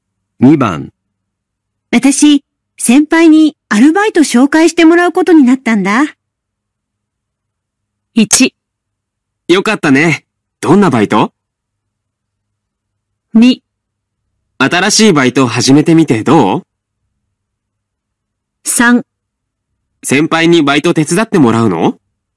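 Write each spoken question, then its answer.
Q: 私、先輩にアルバイト紹介してもらうことになったんだ。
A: 1: よかったね。どんなバイト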